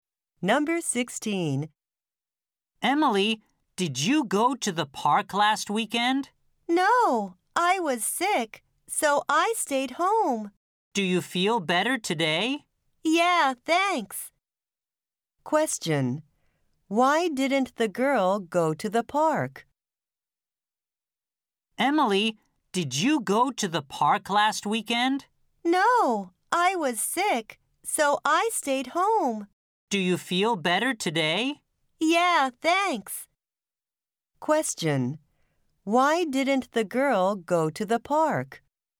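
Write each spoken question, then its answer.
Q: Why didn't the girl go to the park?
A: She was sick.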